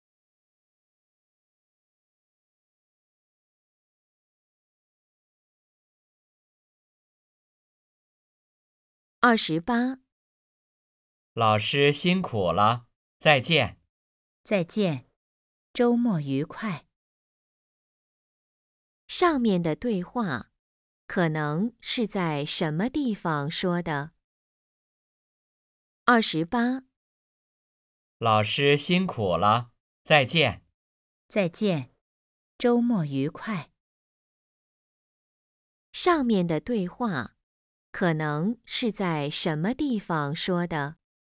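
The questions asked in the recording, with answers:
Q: 上面的对话可能是在什么地方说的?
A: 学校(教室)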